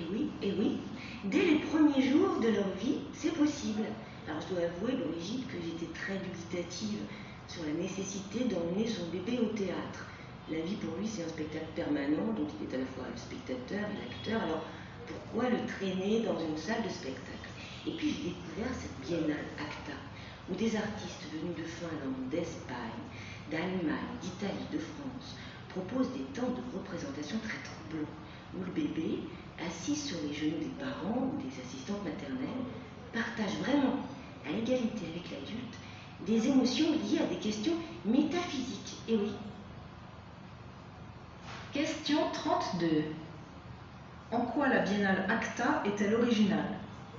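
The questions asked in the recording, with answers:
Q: En quoi la biennale ACTA est-elle originale?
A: Elle propose des spectacles d'artistes européens où les bébés partagent, à égalité avec les adultes, des émotions liées à des questions métaphysiques.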